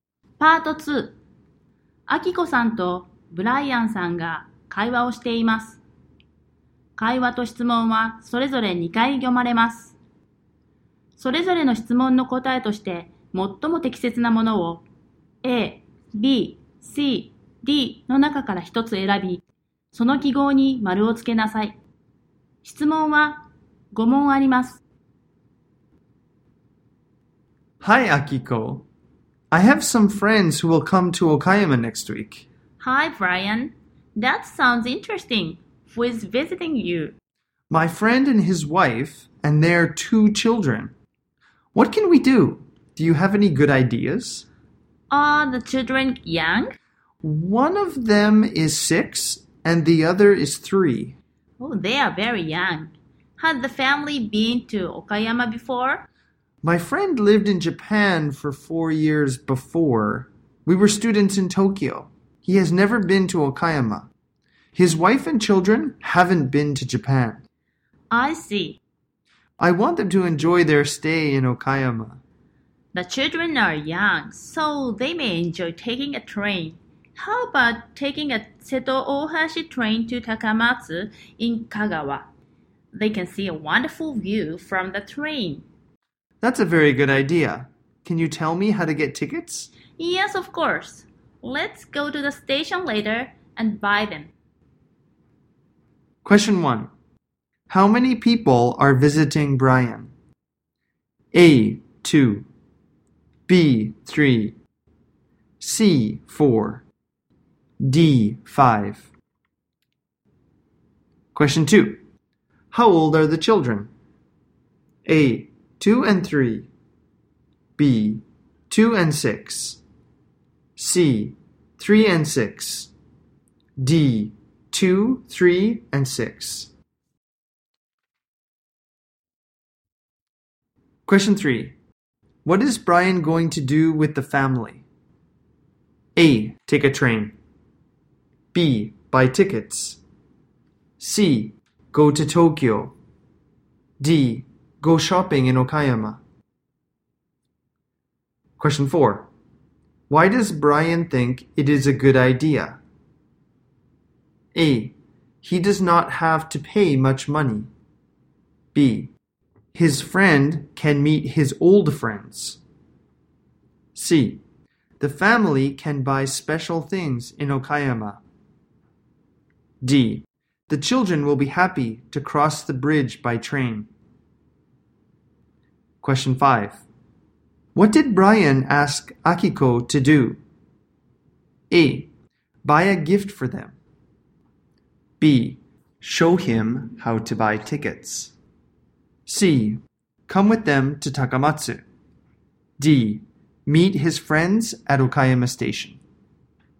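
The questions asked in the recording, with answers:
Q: How many people are visiting Brian?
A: C: 4

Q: How old are the children?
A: C: 3 and 6

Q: What did Brian ask Akiko to do?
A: B: Show him how to buy tickets.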